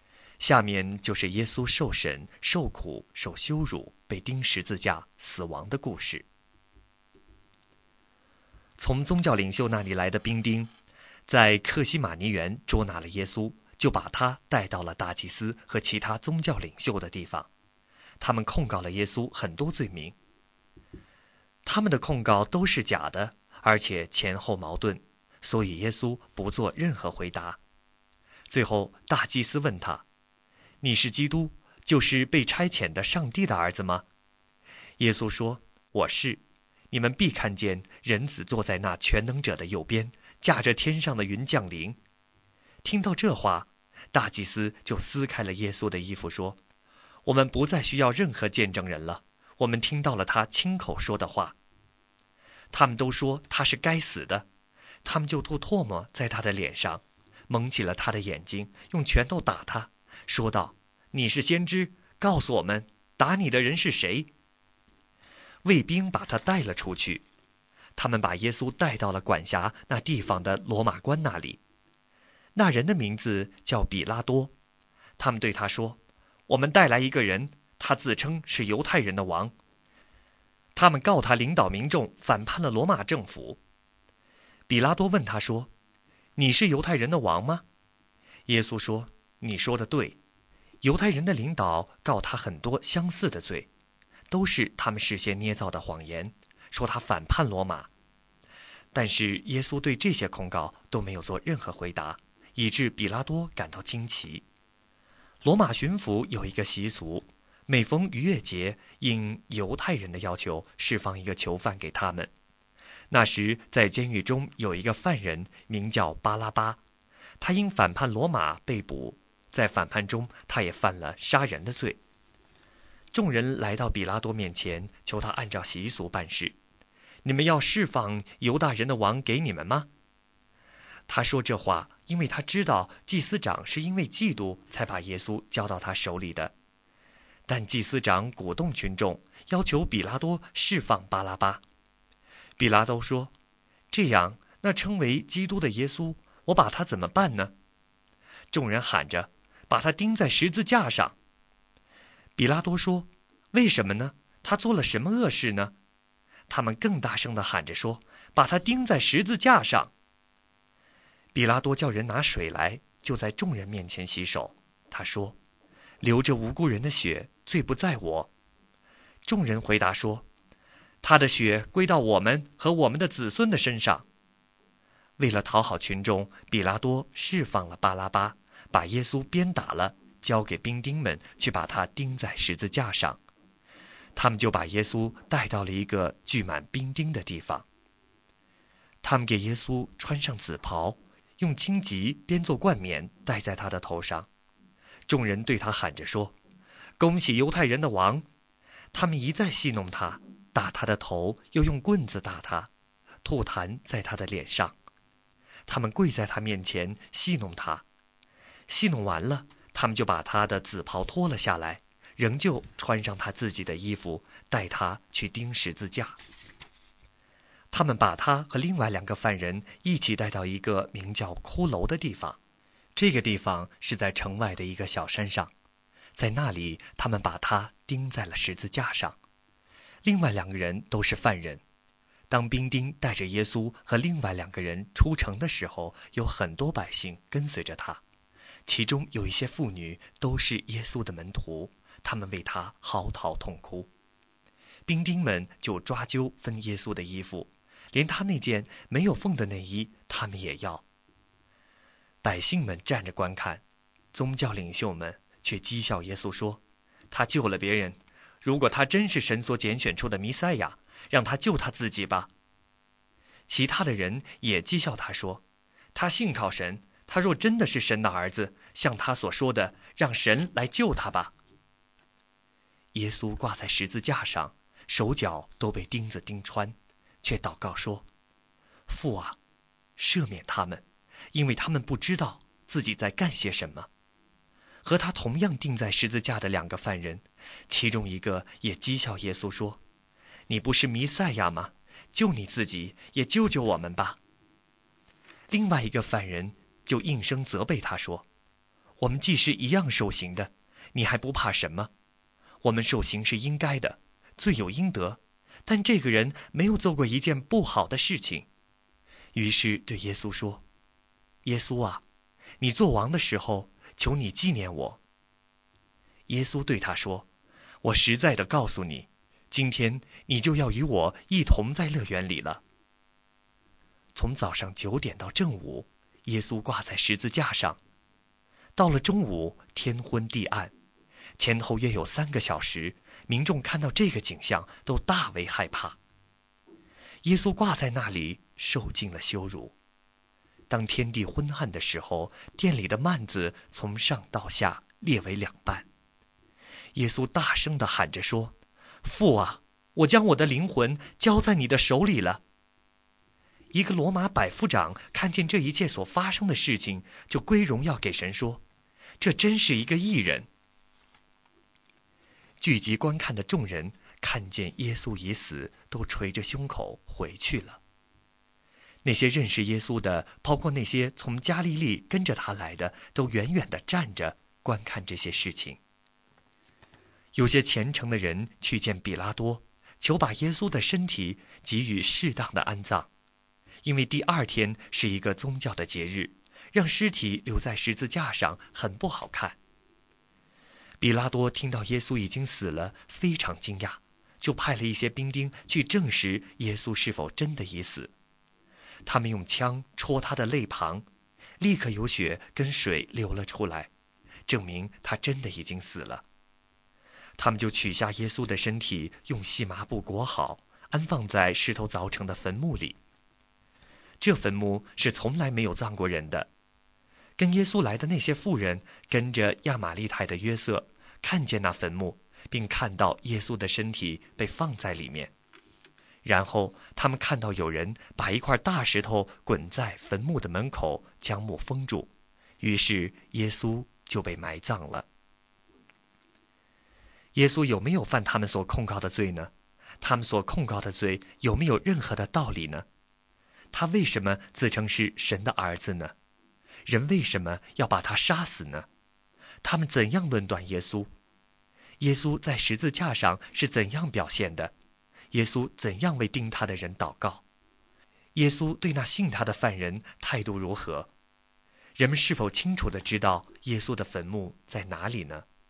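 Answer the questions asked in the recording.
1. 父啊,赦免他们,因为他们不知道自己在干些什么
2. 应许他今天就要与耶稣一同在乐园里
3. 是,跟随耶稣的妇人看见了坟墓和安放的身体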